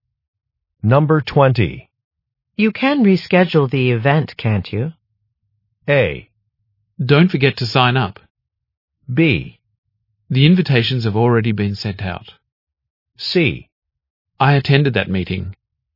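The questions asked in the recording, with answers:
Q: You can reschedule the event, can't you?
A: B: The invitations have already been sent out.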